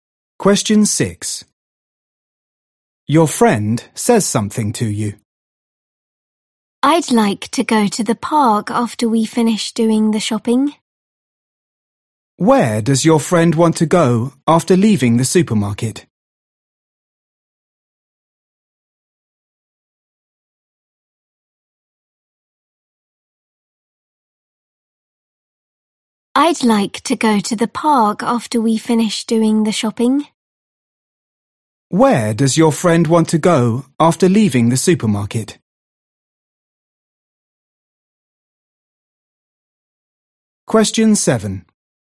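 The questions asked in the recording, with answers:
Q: Where does your friend want to go after leaving the supermarket?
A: the park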